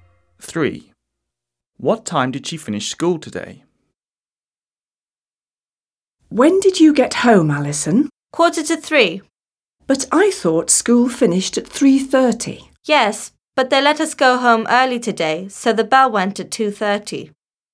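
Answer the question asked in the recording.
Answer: 2:30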